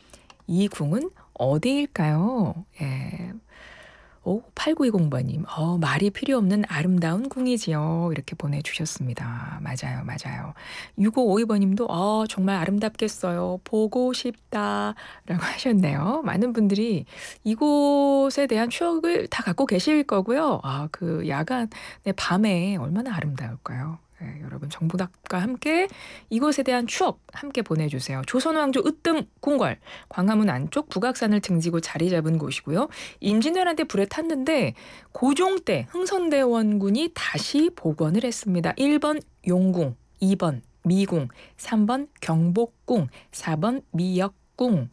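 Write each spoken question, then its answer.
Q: 이 궁은 어디일까요?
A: 3: 경복궁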